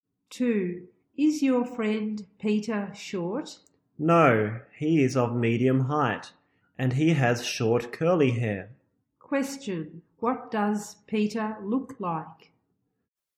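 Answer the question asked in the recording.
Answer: He is of medium height with short curly hair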